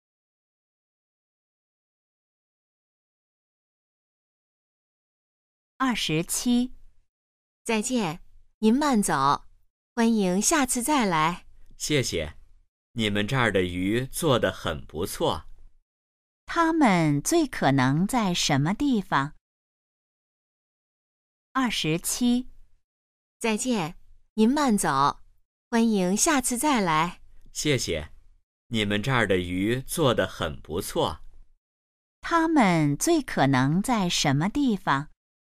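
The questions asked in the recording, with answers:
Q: 他们最可能在什么地方?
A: 饭馆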